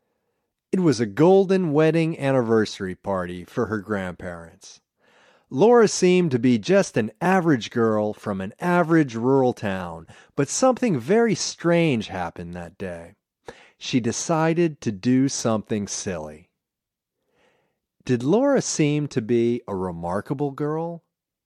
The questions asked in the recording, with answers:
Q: Did Laura seem to be a remarkable girl?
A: No, she didn't seem to be a remarkable girl.